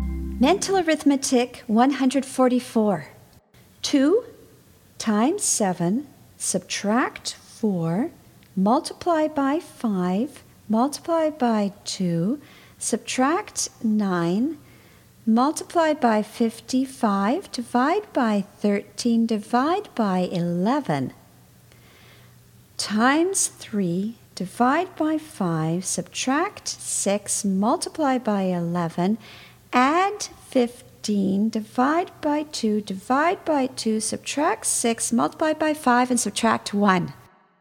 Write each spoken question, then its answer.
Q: 2 times 7, subtract 4, multiply by 5, multiply by 2, subtract 9, multiply by 55, divide by 13, divide by 11, times 3, divide by 5, subtract 6, multiply by 11, add 15, divide by 2, divide by 2, subtract 6, multiply by 5, and subtract 1.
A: And the answer is 194.